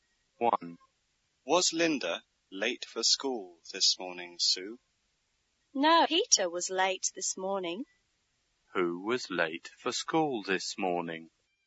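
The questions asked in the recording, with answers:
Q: Who was late for school this morning?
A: Peter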